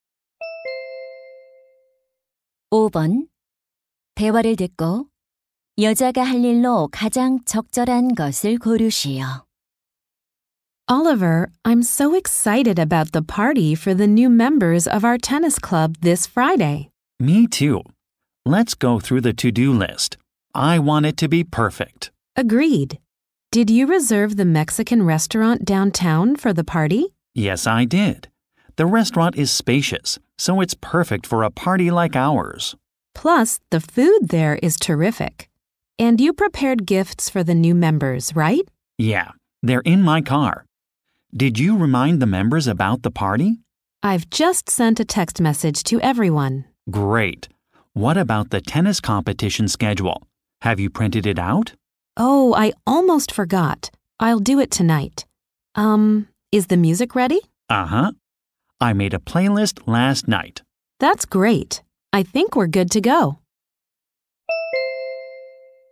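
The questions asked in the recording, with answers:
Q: 대화를 듣고 여자가 할 일로 가장 적절한 것을 고르시오.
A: 테니스 대회 일정표 출력하기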